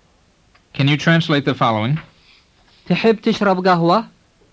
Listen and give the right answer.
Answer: It means, would you like to drink coffee?